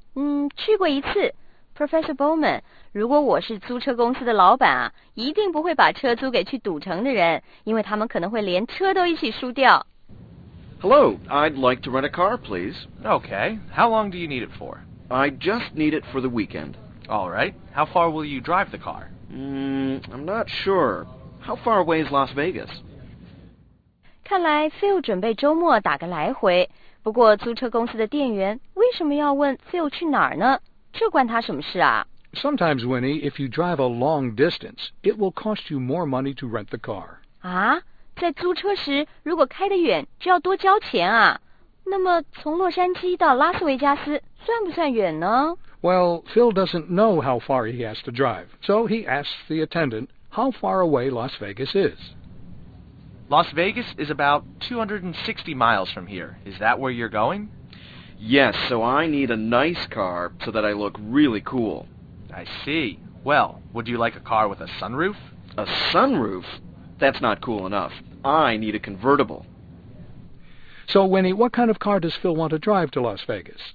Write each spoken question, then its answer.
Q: So, Winnie, what kind of car does Phil want to drive to Las Vegas?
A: 他想开一辆酷酷的车,去拉斯维加斯这种花花世界啊,当然得开辆好车咯。